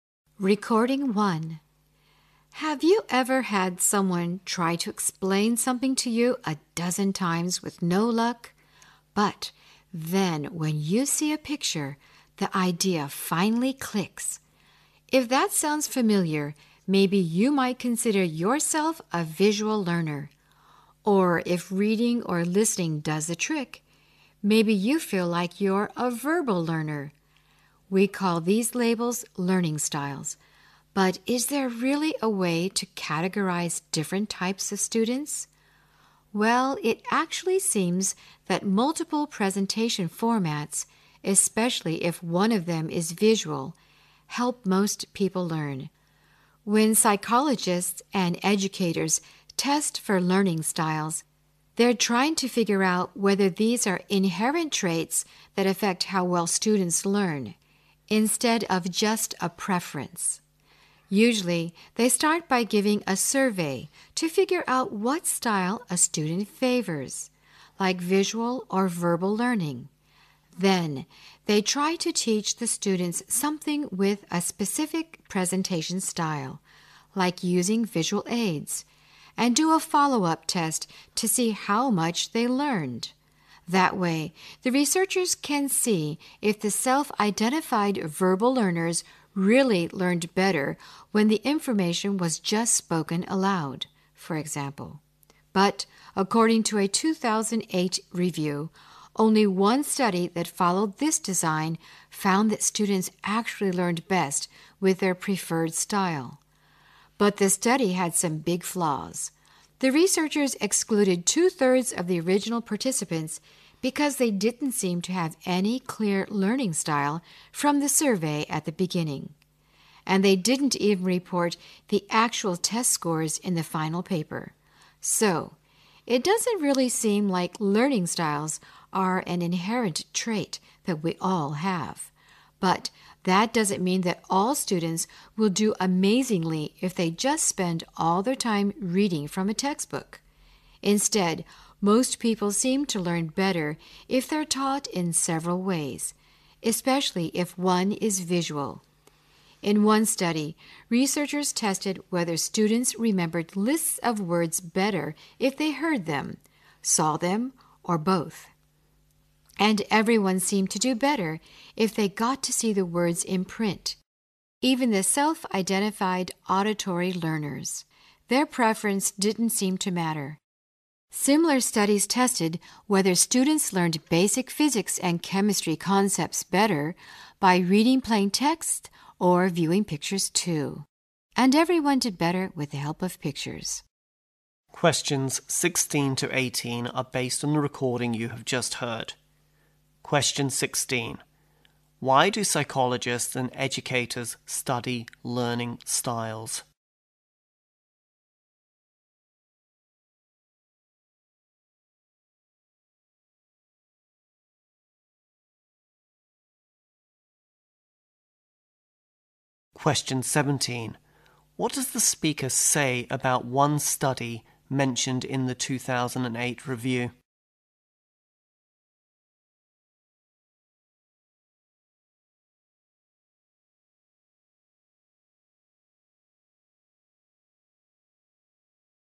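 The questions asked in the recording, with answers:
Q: Why do psychologists and educators study learning styles?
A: To find out whether learning styles are inherent traits that affect how well students learn.

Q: What does the speaker say about one study mentioned in the 2008 review?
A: It had some big flaws.

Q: What message does the speaker want to convey about learning at the end of the talk?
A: People learn better when taught in several ways, especially with visuals.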